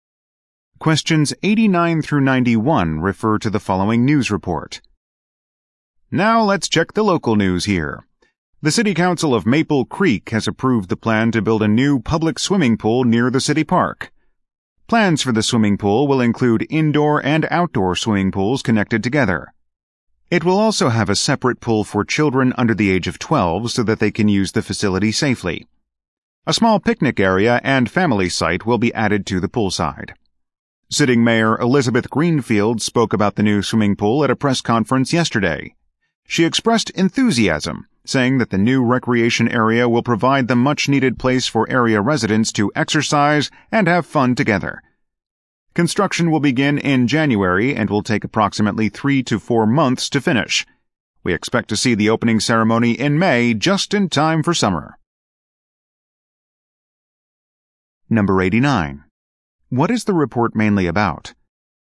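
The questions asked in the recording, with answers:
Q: What is the report mainly about?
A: A plan to build a new public swimming pool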